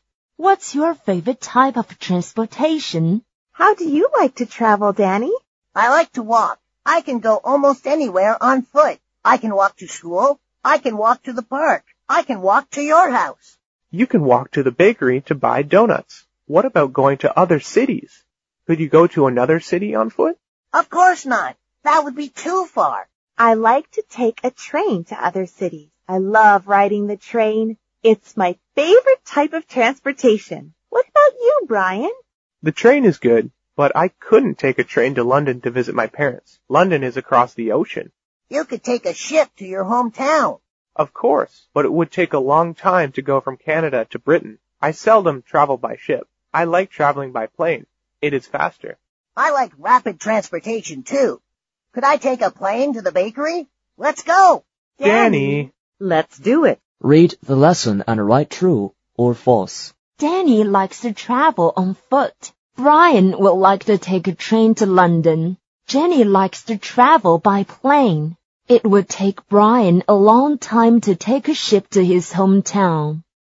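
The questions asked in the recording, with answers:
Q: Danny likes to travel on foot.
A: True

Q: Brian will like to take a train to London.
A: False

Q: It would take Brian a long time to take a ship to his hometown.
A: True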